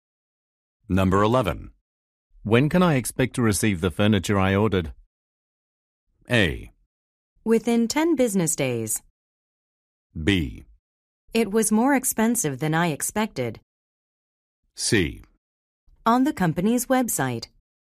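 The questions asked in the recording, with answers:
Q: When can I expect to receive the furniture I ordered?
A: A: Within 10 business days.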